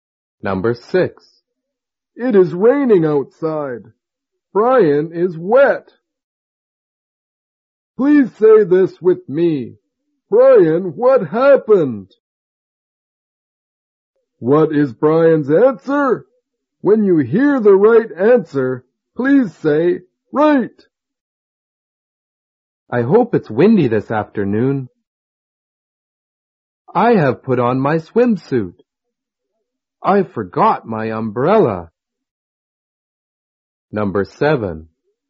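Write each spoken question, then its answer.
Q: What is Brian's answer?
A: I forgot my umbrella.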